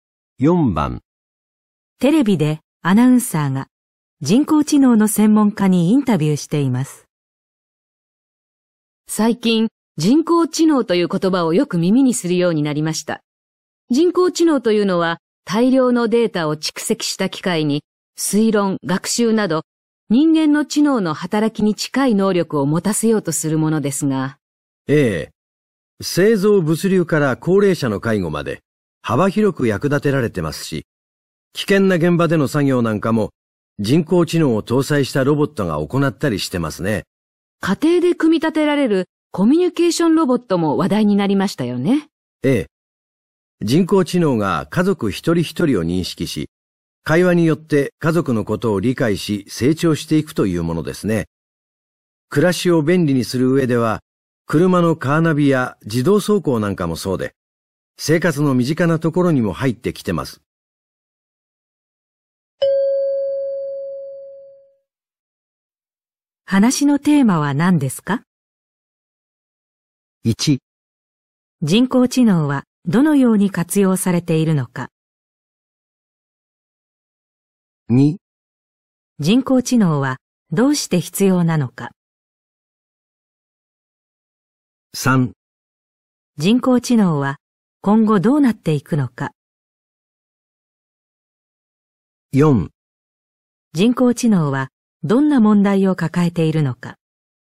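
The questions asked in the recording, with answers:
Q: 話のテーマは何ですか?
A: 1: 人工知能はどのように活用されているのか?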